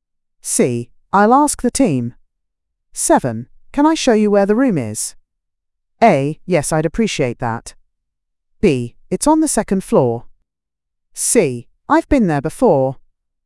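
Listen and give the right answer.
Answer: A: Yes, I'd appreciate that.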